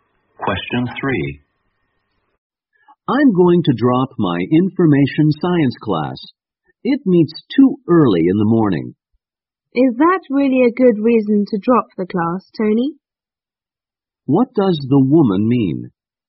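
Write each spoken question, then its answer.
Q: What does the woman mean?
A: Meeting too early isn't a good reason to drop the class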